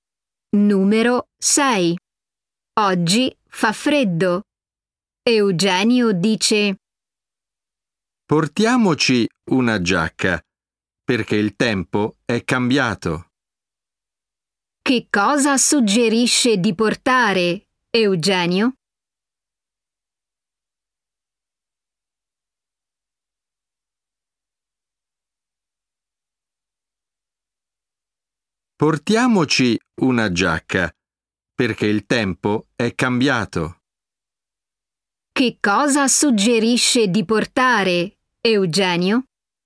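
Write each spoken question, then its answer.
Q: Che cosa suggerisce di portare, Eugenio?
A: una giacca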